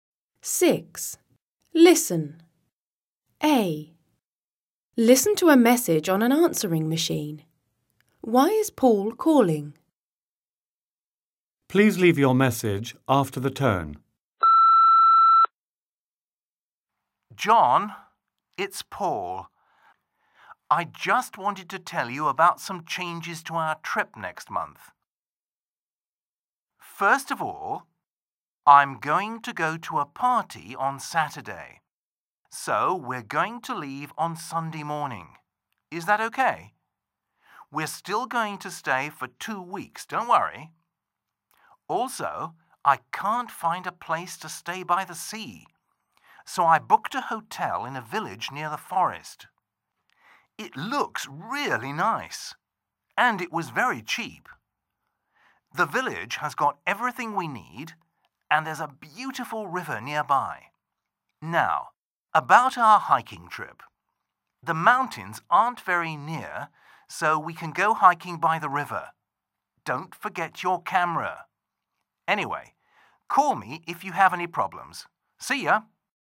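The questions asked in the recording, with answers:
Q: Why is Paul calling?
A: To tell John about some changes to their trip next month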